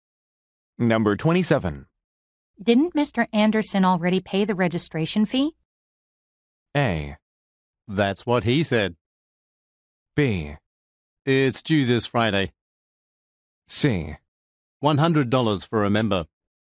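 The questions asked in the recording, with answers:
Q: Didn't Mr. Anderson already pay the registration fee?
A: A: That's what he said.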